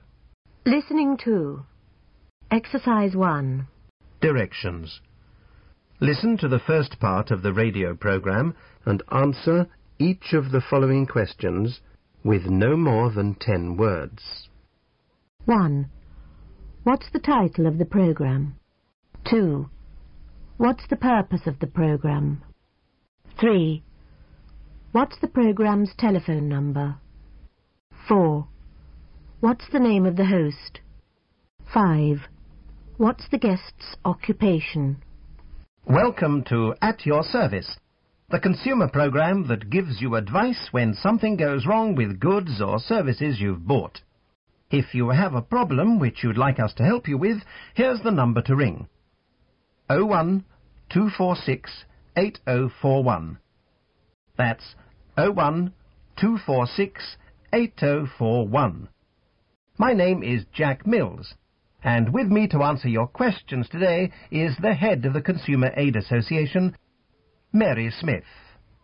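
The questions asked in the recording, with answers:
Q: What's the title of the program?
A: At Your Service

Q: What's the purpose of the program?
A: To give consumers advice when something goes wrong with goods or services they've bought

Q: What's the program's telephone number?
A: 01-246-8041

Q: What's the name of the host?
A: Jack Mills

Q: What's the guest's occupation?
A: Head of the Consumer Aid Association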